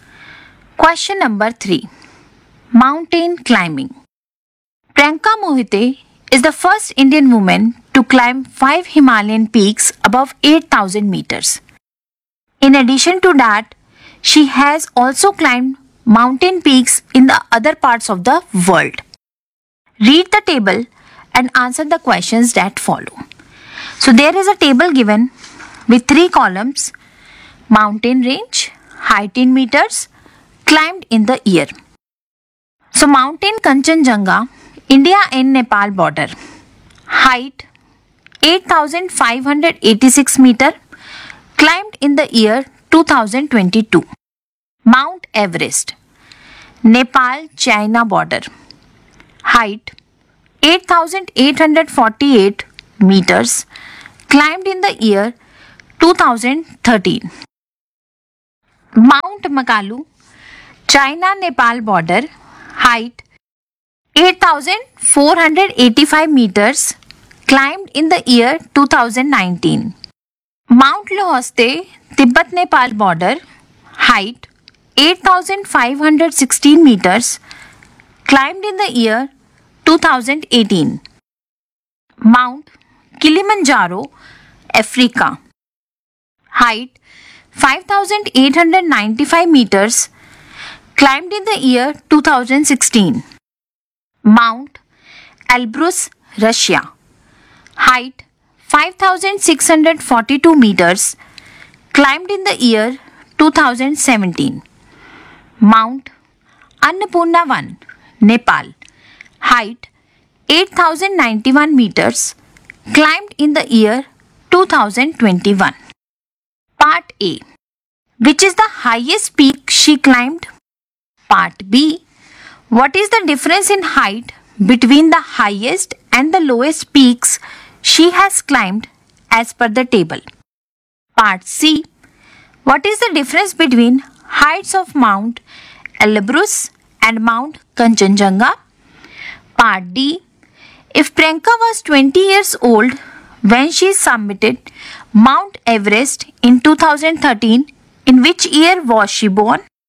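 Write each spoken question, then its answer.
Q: Which is the highest peak she climbed?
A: Mount Everest (8,848 m)

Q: What is the difference in height between the highest and the lowest peaks she has climbed as per the table?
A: 3,206 meters

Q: What is the difference between heights of Mount Elbrus and Mount Kanchenjunga?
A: 2,944 meters

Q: If Priyanka was 20 years old when she summited Mount Everest in 2013, in which year was she born?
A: 1993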